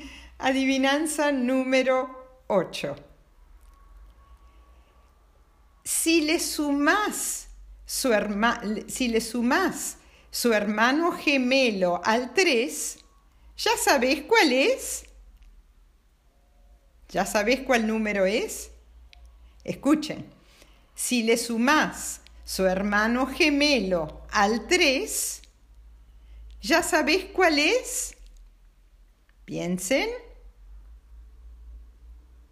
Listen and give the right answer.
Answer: Sí, respuesta, el 6.